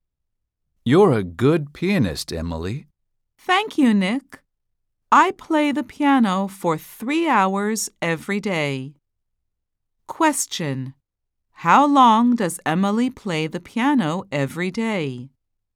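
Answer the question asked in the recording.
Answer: 3 hours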